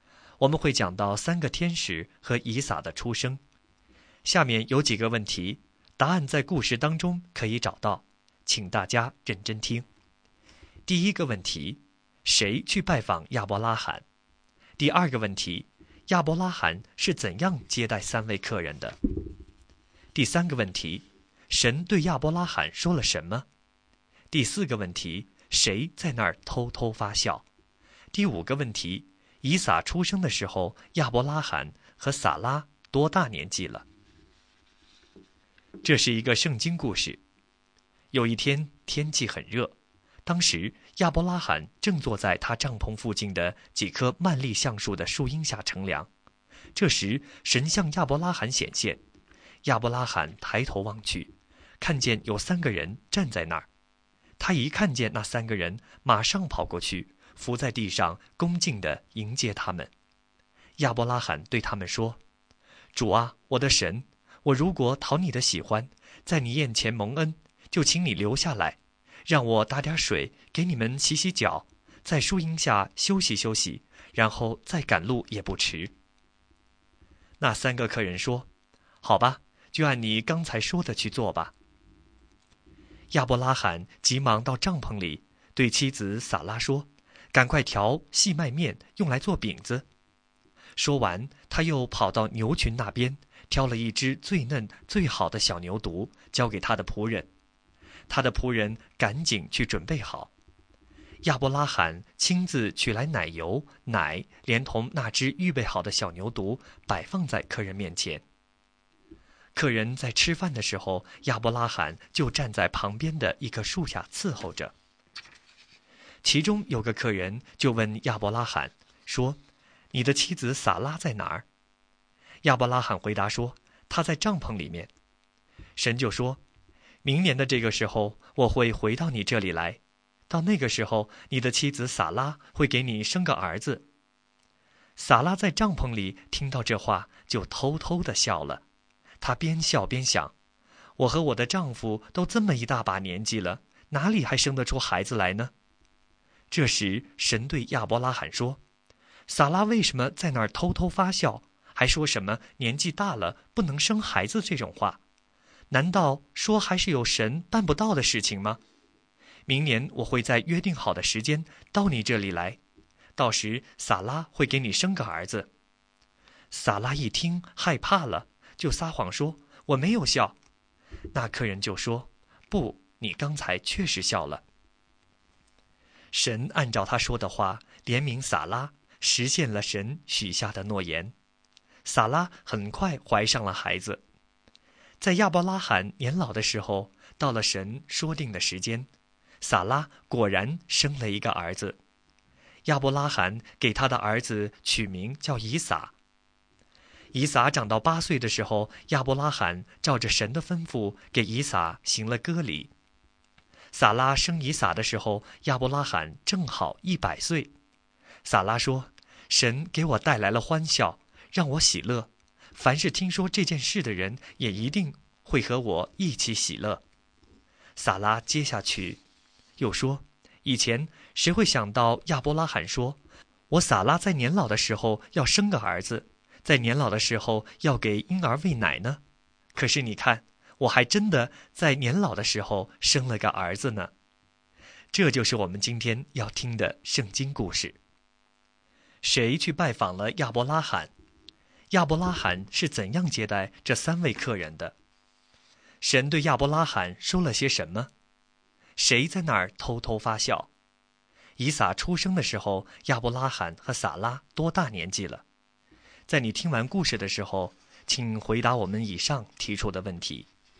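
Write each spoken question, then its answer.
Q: 谁去拜访亚伯拉罕?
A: 三个人(三位天使/神)

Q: 亚伯拉罕是怎样接待三位客人的?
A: 打水给他们洗脚,请他们在树荫下休息,让撒拉做饼,预备小牛犊和奶油奶款待他们,并站在旁边伺候

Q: 神对亚伯拉罕说了什么?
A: 明年这个时候他会回来,撒拉会给亚伯拉罕生个儿子

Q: 谁在那儿偷偷发笑?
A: 撒拉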